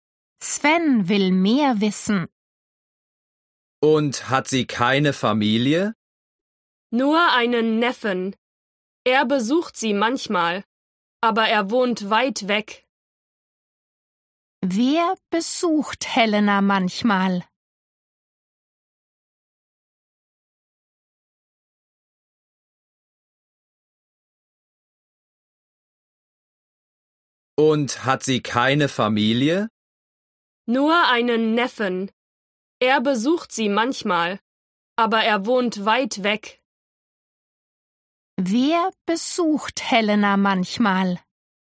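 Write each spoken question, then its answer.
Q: Wer besucht Helena manchmal?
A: ihr Neffe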